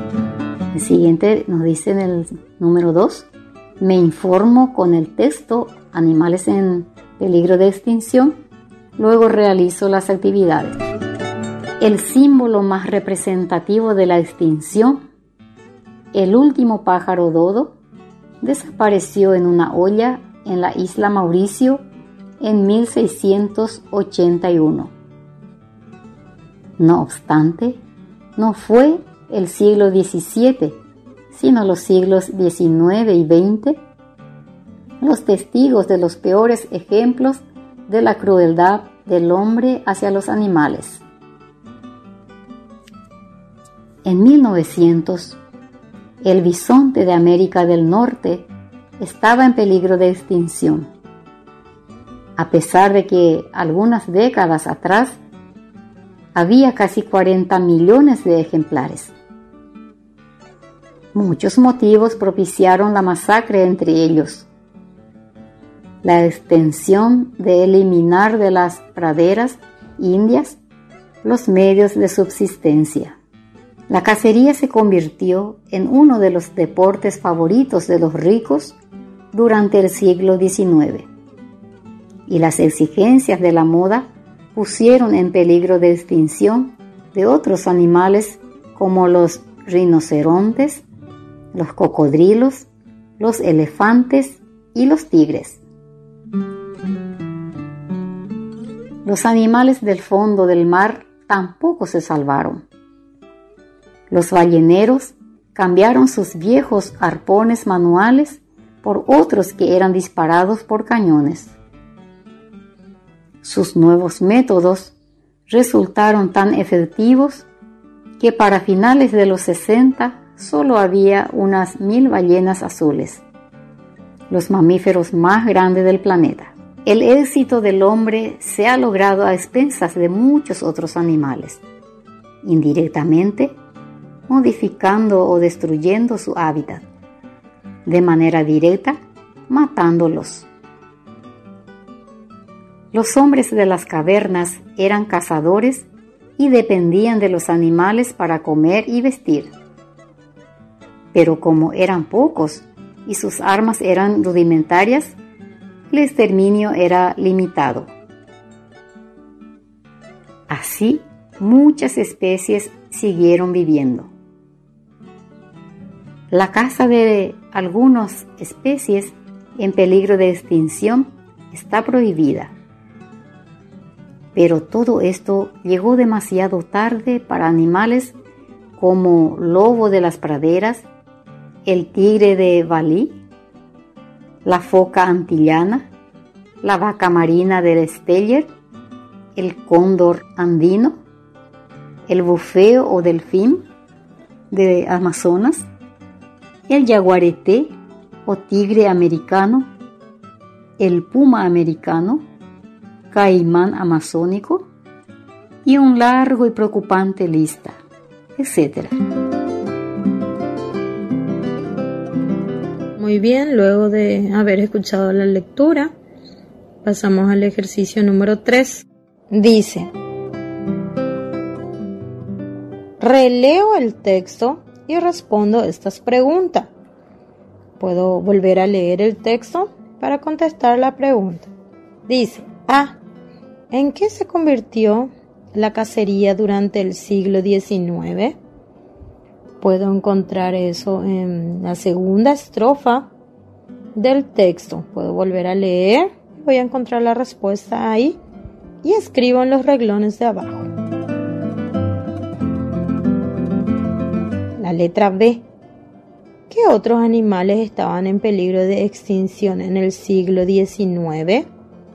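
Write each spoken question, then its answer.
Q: ¿En qué se convirtió la cacería durante el siglo XIX?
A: En uno de los deportes favoritos de los ricos

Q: ¿Qué otros animales estaban en peligro de extinción en el siglo XIX?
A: Los rinocerontes, los cocodrilos, los elefantes y los tigres (además del bisonte)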